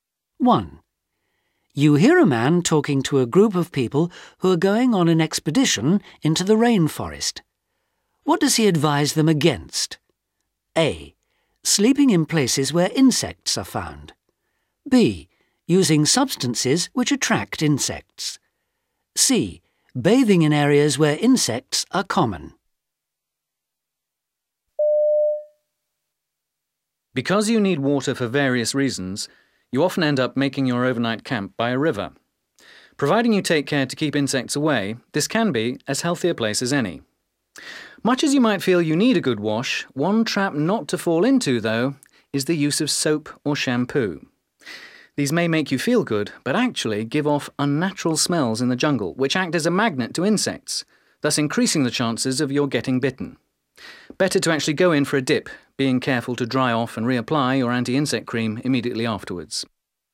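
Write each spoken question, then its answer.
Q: What does he advise them against?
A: B: Using substances which attract insects.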